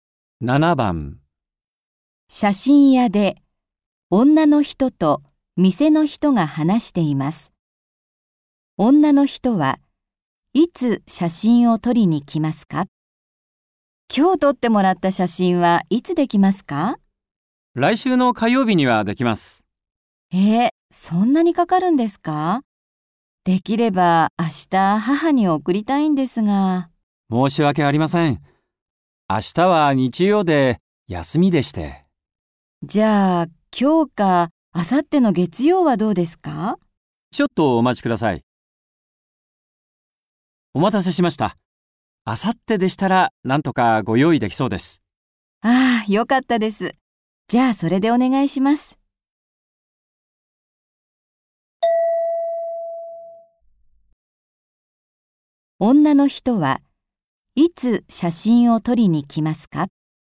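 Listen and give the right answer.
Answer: 明後日の月曜日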